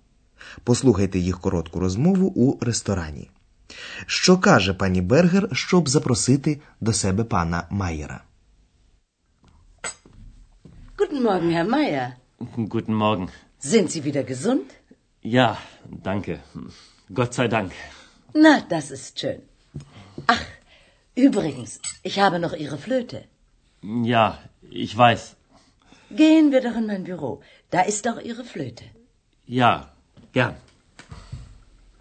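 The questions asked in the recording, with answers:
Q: Що каже пані Бергер, щоб запросити до себе пана Майєра?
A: Gehen wir doch in mein Büro.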